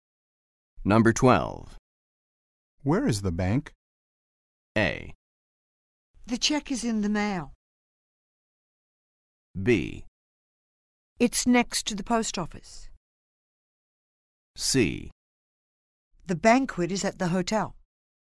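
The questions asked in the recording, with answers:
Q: Where is the bank?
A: B: It's next to the post office.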